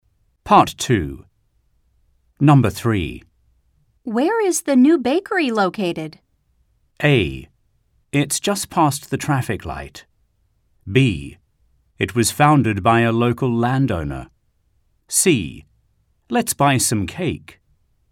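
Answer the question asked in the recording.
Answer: A: It's just past the traffic light.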